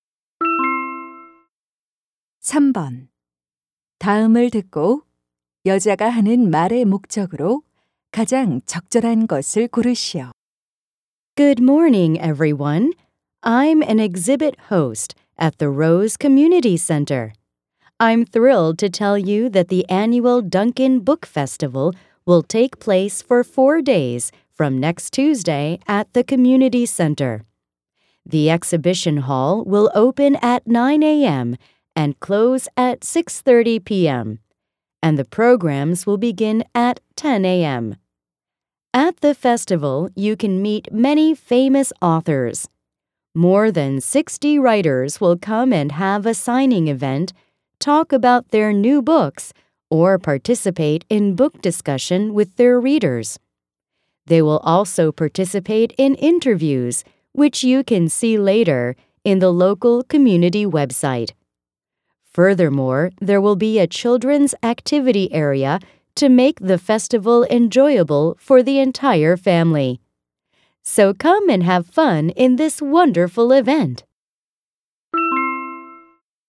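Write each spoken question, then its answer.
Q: 다음을 듣고 여자가 하는 말의 목적으로 가장 적절한 것을 고르시오.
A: 던컨 도서 축제를 홍보하려고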